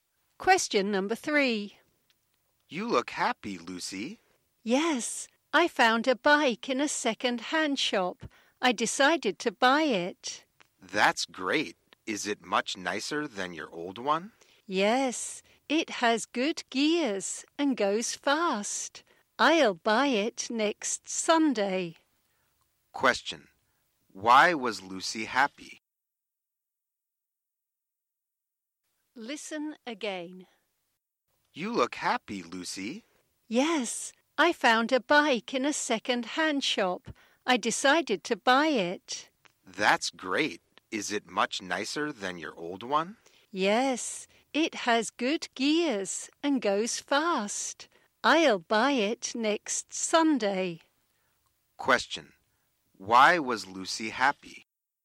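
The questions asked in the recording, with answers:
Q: Why was Lucy happy?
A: She found a bike she wanted in a second-hand shop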